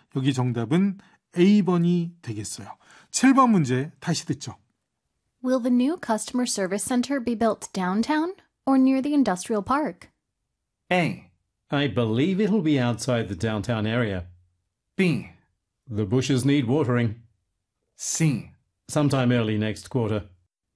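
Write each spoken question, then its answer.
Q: Will the new customer service center be built downtown or near the industrial park?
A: A: I believe it'll be outside the downtown area.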